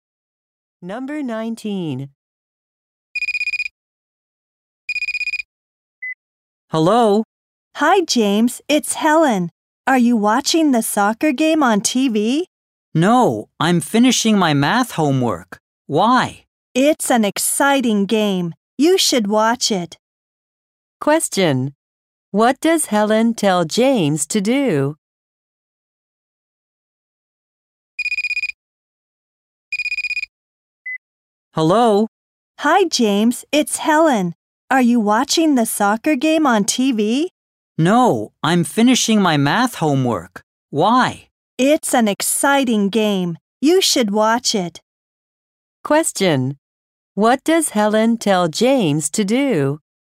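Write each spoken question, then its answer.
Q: What does Helen tell James to do?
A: Watch the soccer game on TV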